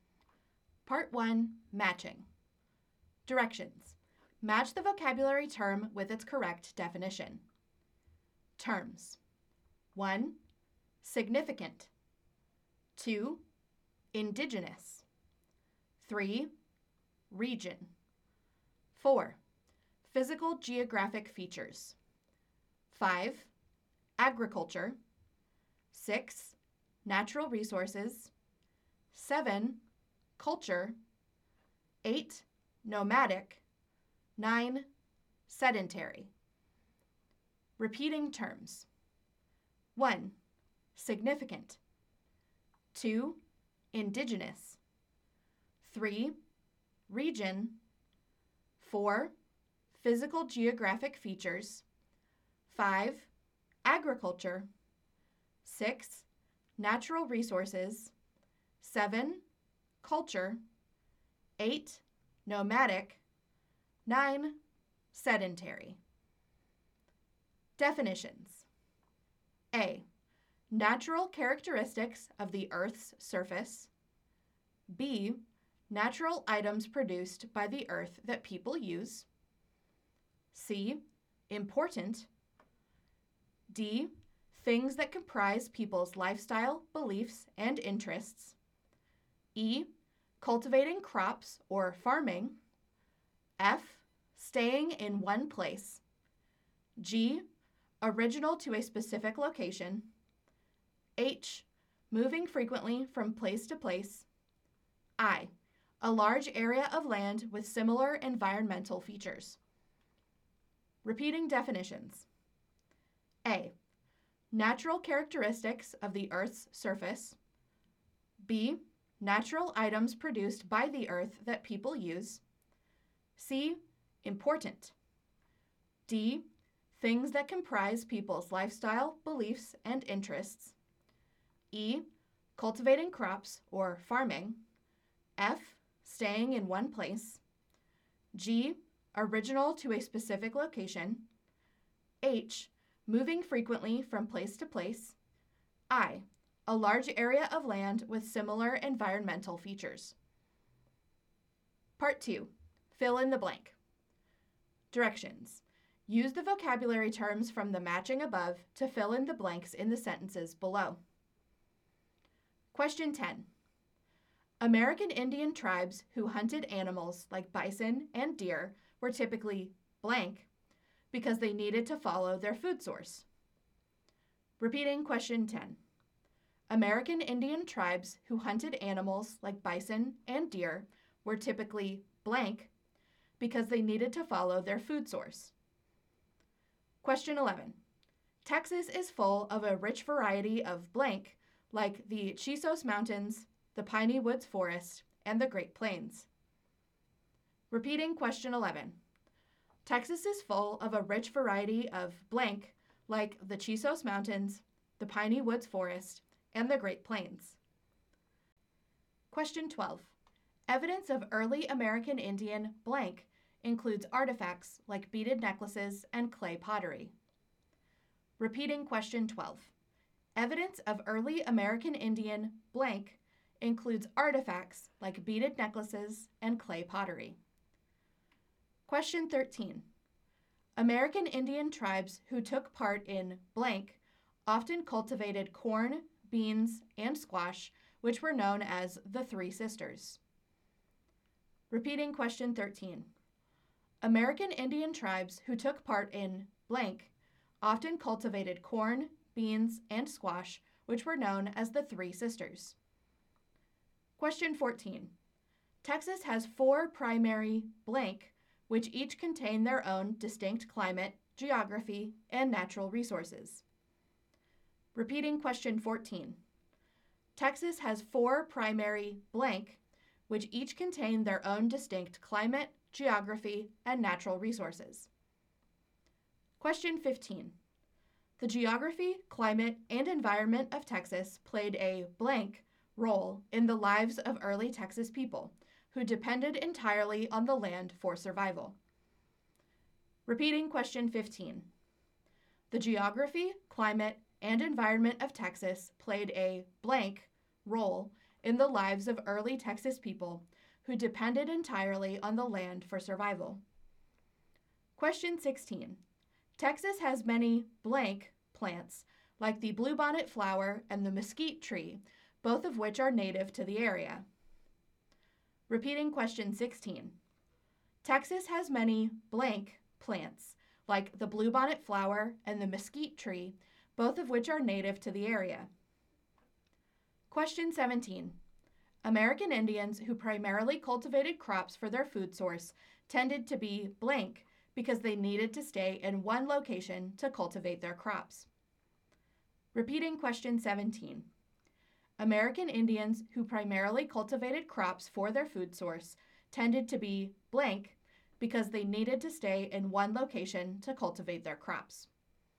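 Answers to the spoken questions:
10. nomadic
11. physical geographic features
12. culture
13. agriculture
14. regions
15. significant
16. indigenous
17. sedentary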